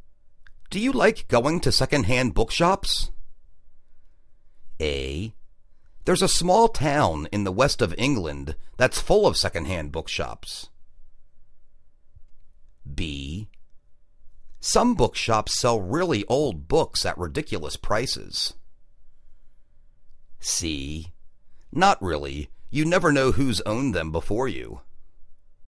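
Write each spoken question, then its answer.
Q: Do you like going to secondhand bookshops?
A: C: Not really. You never know who's owned them before you.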